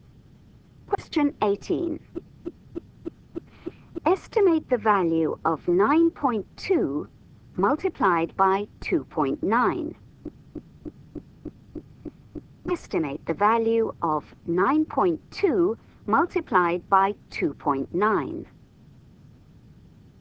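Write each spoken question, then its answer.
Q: Estimate the value of 9.2 multiplied by 2.9.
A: about 27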